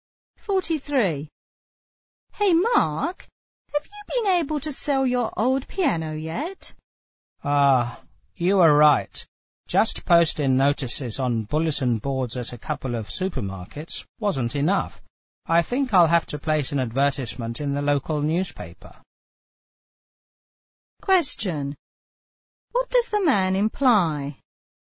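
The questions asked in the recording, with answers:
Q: What does the man imply?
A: He hasn't sold the piano yet.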